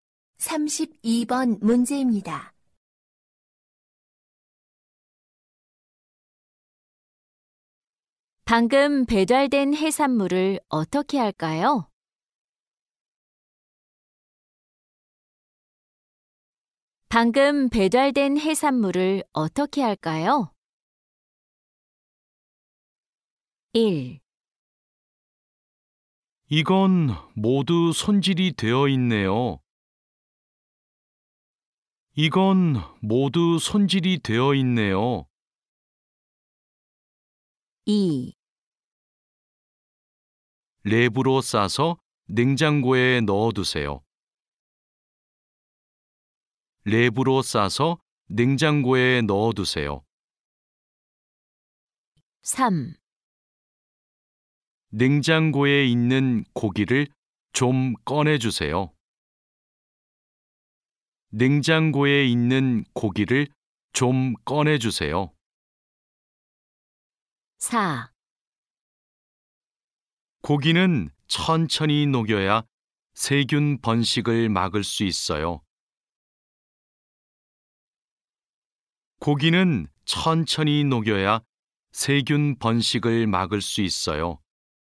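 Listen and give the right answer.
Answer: 2: 랩으로 싸서 냉장고에 넣어두세요.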